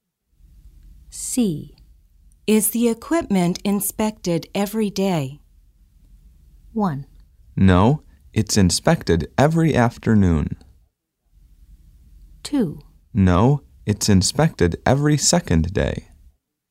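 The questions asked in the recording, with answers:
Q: Is the equipment inspected every day?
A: 2: No, it's inspected every second day.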